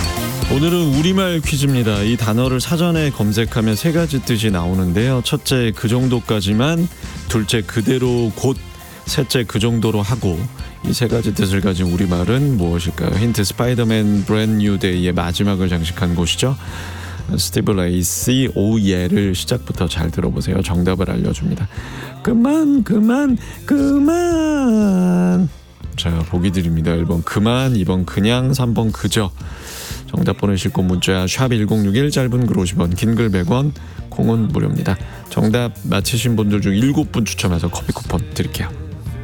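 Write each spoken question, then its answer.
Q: 이 세 가지 뜻을 가진 우리말은 무엇일까요?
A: 1: 그만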